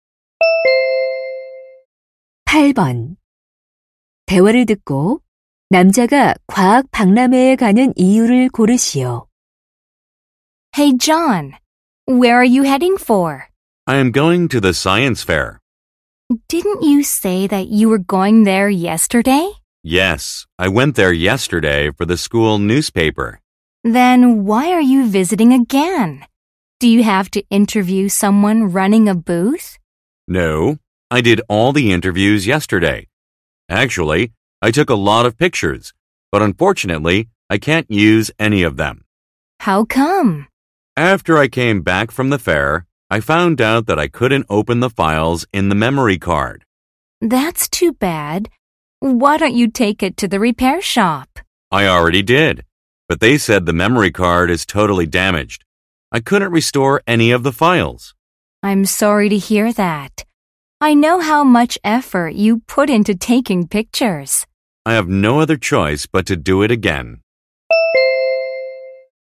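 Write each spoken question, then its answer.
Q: 대화를 듣고 남자가 과학 박람회에 가는 이유를 고르시오.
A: 사진을 다시 찍기 위해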